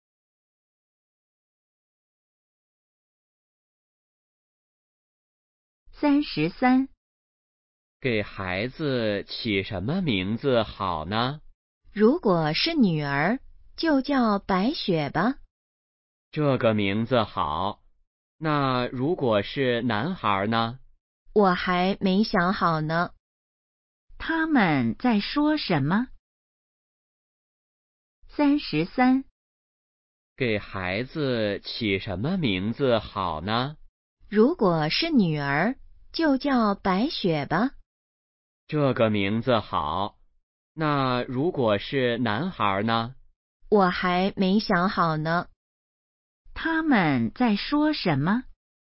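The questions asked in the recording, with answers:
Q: 他们在说什么?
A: 给孩子起名字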